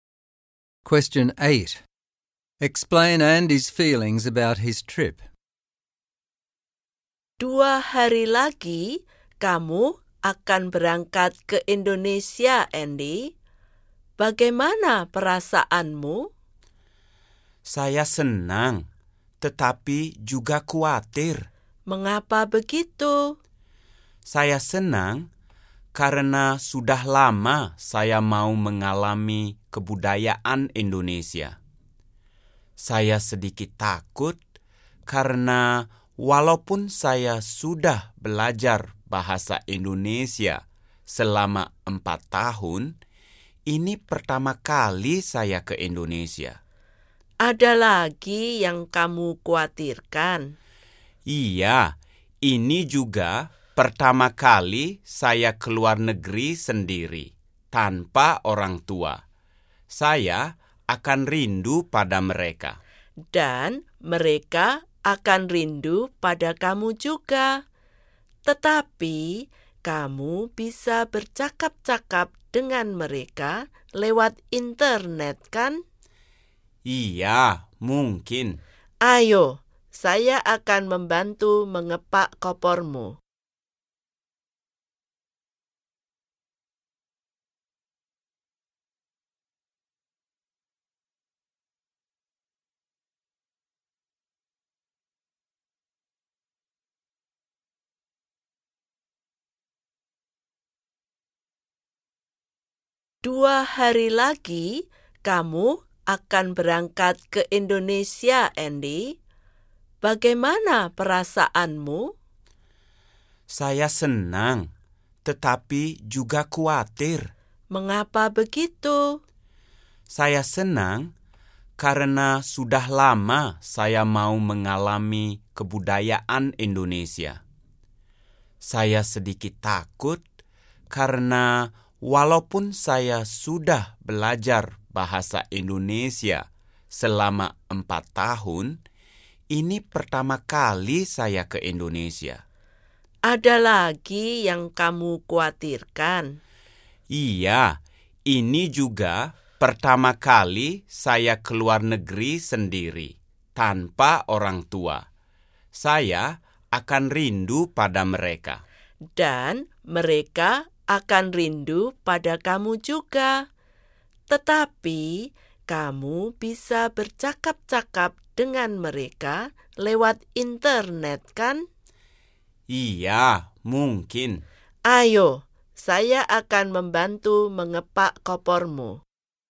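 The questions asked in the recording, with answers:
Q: Explain Andy's feelings about his trip.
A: Happy because he will experience Indonesian culture, but worried because it is his first trip to Indonesia and first time abroad without his parents, whom he will miss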